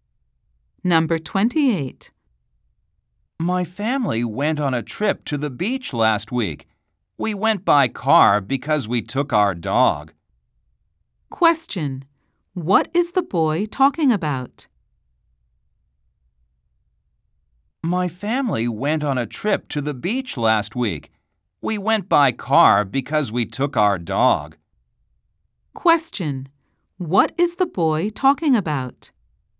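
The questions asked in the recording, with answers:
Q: What is the boy talking about?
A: His family's trip to the beach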